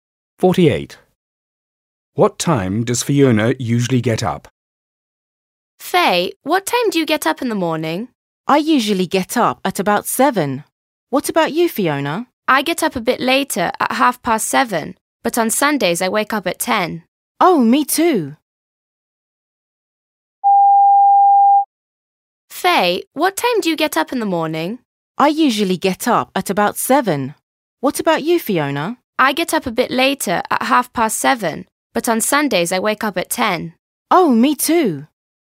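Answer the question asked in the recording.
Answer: At 7:30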